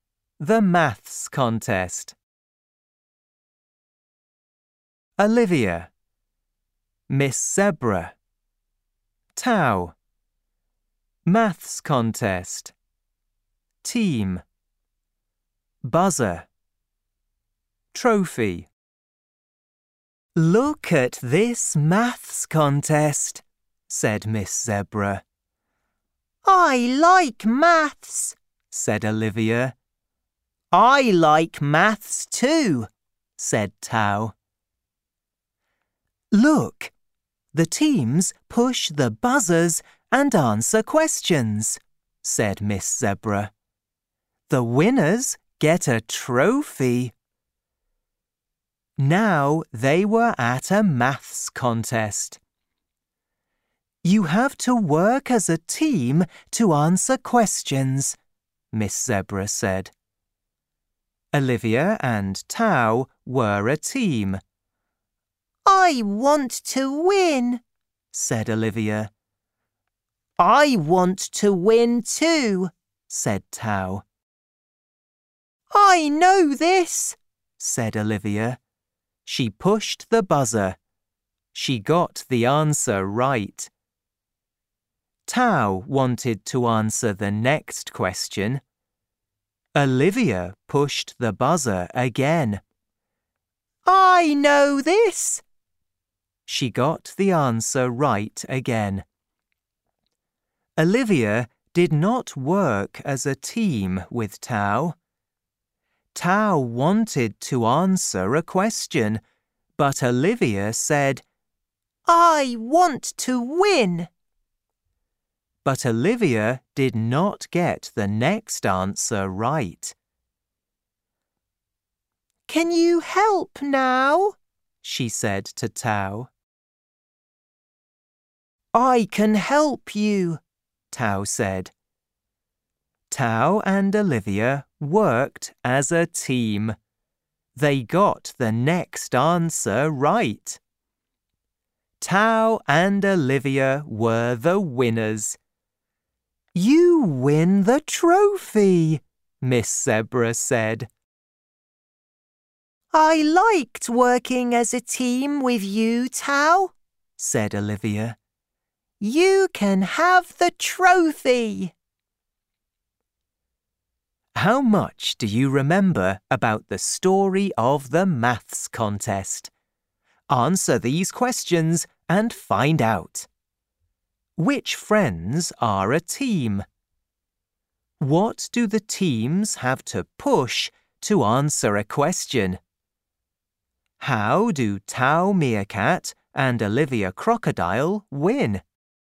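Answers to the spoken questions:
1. Olivia and Tau
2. The buzzers
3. They work as a team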